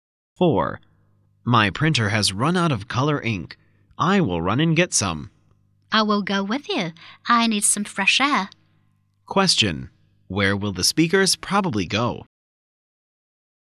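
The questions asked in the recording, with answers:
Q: Where will the speakers probably go?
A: To a store to buy ink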